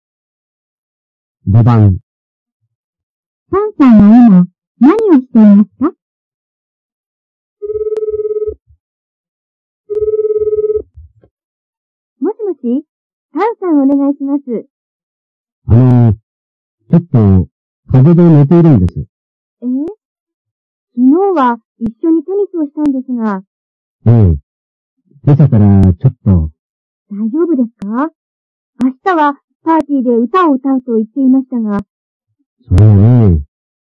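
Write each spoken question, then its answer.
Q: パンさんは今、何をしていますか?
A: 風邪で寝ている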